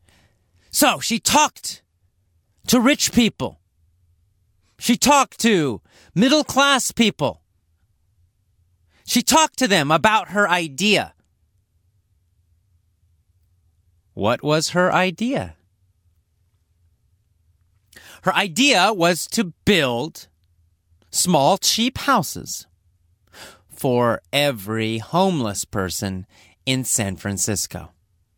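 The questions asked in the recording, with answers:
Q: What was her idea?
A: To build small, cheap houses for every homeless person in San Francisco.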